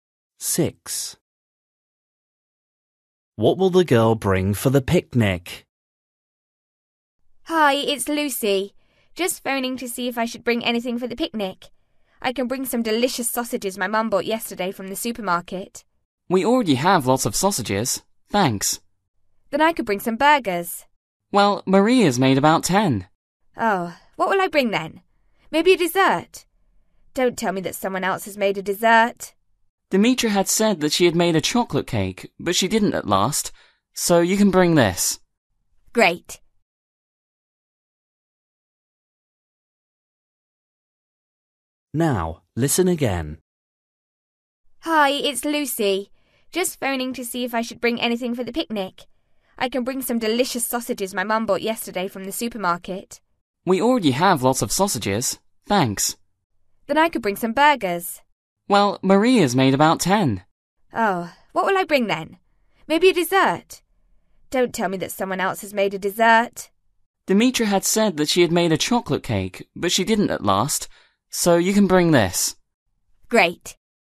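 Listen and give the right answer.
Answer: a dessert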